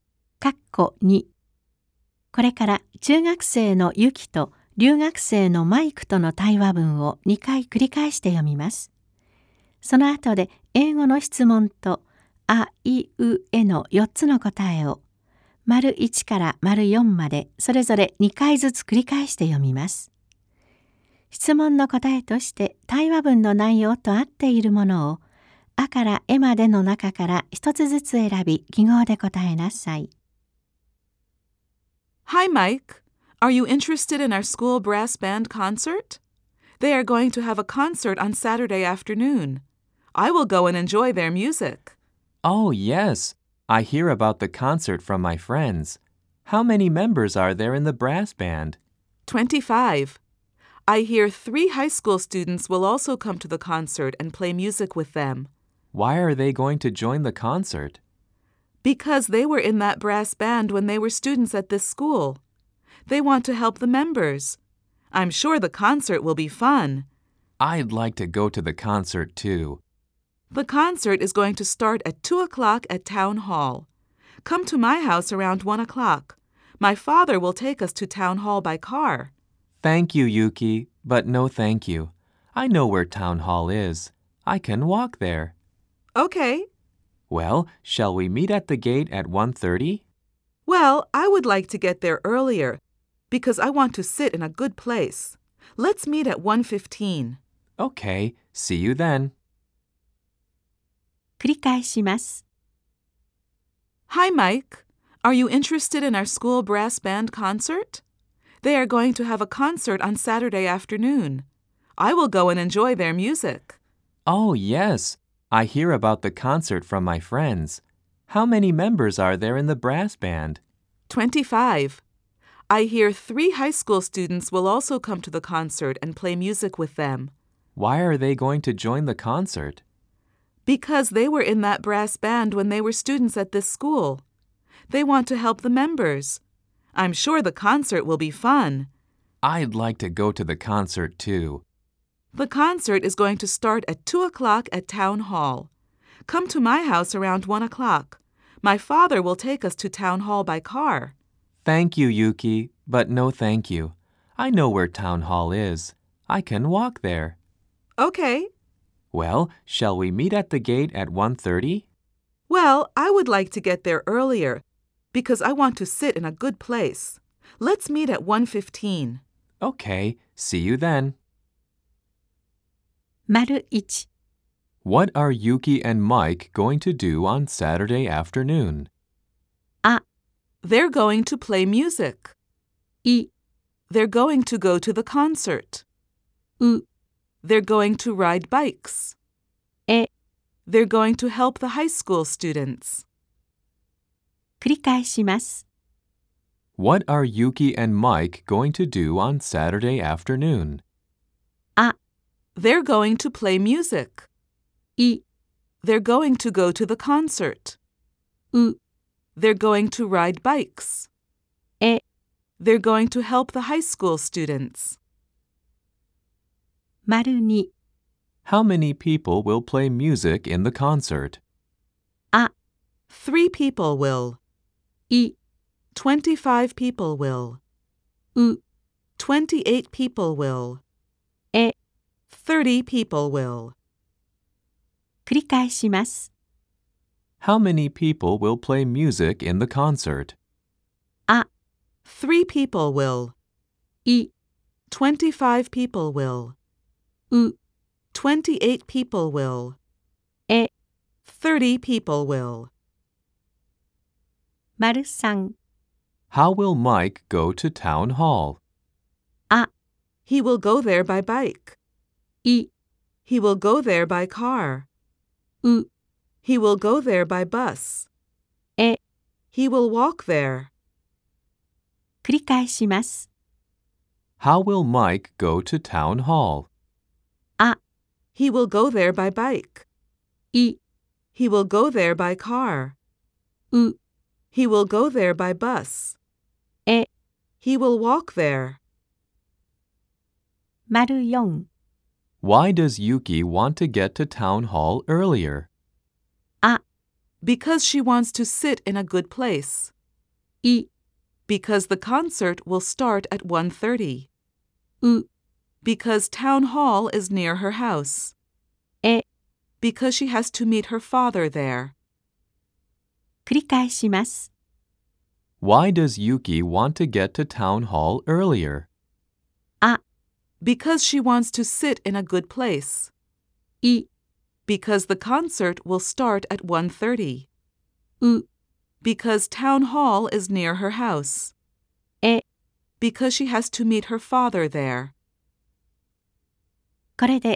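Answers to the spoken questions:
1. い: They're going to go to the concert.
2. う: 28 people will.
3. え: He will walk there.
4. あ: Because she wants to sit in a good place.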